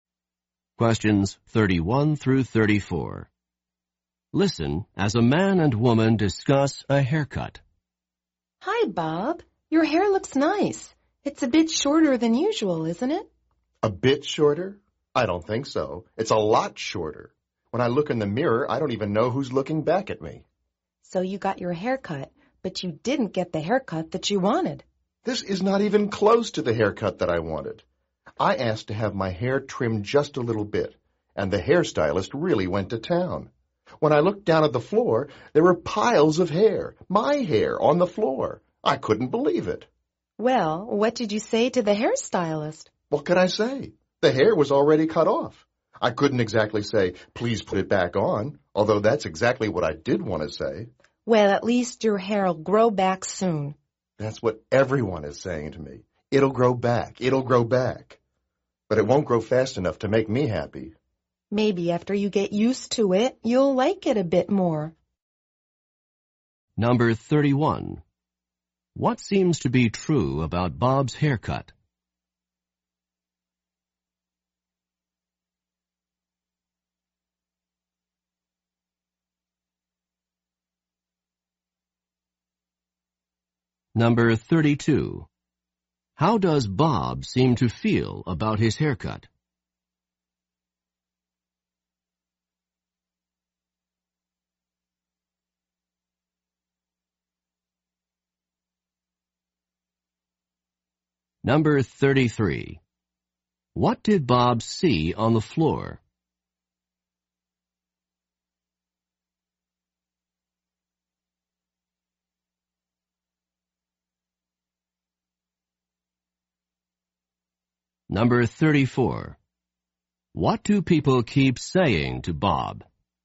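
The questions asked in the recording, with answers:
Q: What seems to be true about Bob's haircut?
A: It is a lot shorter than he wanted

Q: How does Bob seem to feel about his haircut?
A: Unhappy with it

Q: What did Bob see on the floor?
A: Piles of his hair

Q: What do people keep saying to Bob?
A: It'll grow back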